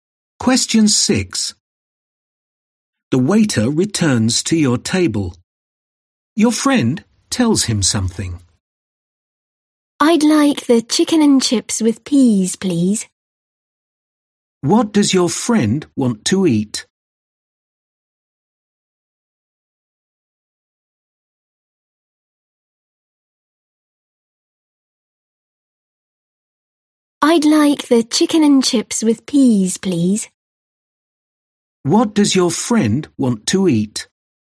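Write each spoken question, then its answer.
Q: What does your friend want to eat?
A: Chicken and chips with peas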